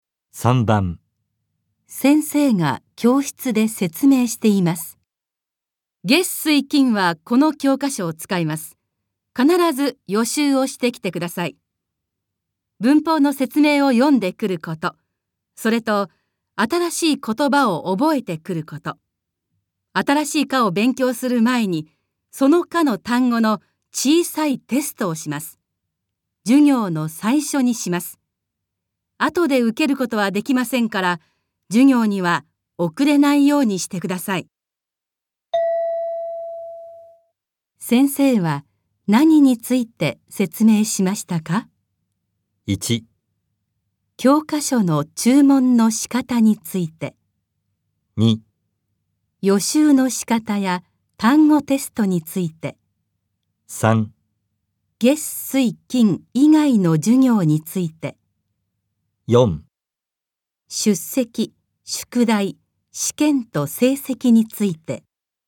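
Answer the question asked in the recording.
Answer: 2: 予習の仕方や単語テストについて。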